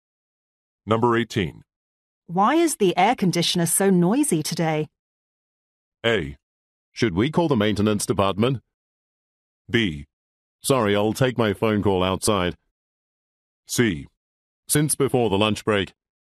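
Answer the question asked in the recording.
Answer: A: Should we call the maintenance department?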